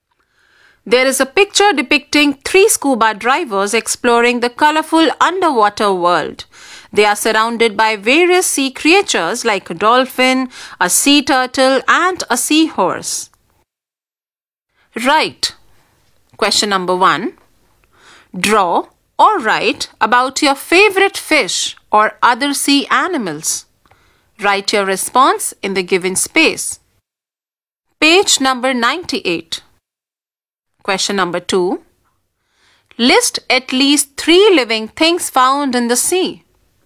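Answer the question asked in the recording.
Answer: Dolphin, sea turtle, seahorse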